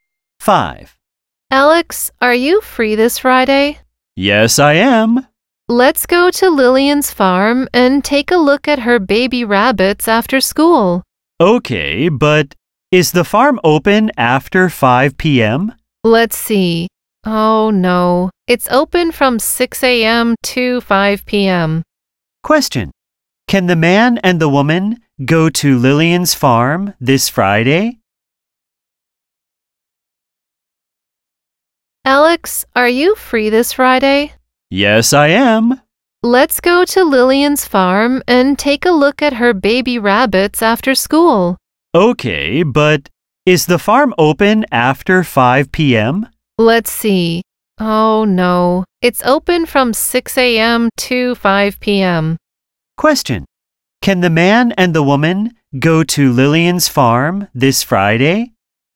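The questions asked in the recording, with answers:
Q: Can the man and the woman go to Lillian's farm this Friday?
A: No, they can't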